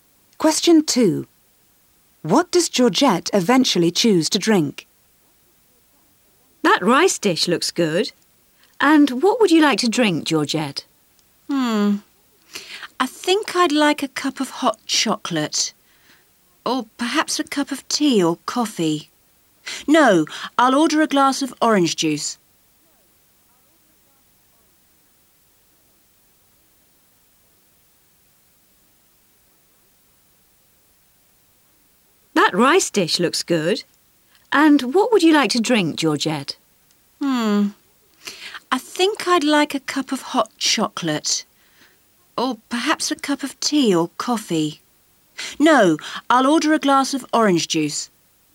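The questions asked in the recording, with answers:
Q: What does Georgette eventually choose to drink?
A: A glass of orange juice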